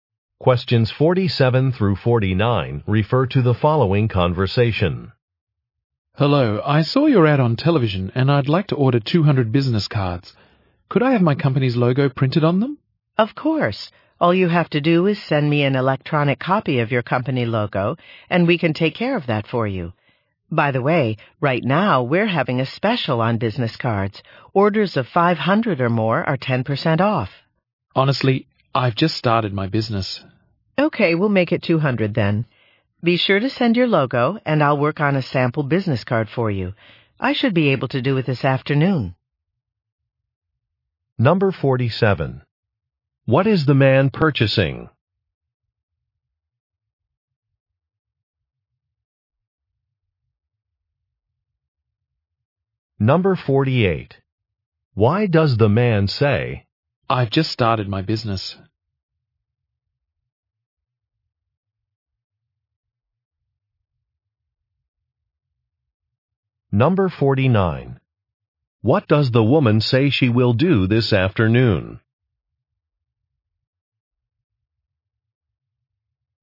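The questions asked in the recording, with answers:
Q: What is the man purchasing?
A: Business cards

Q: What does the woman say she will do this afternoon?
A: Make a sample business card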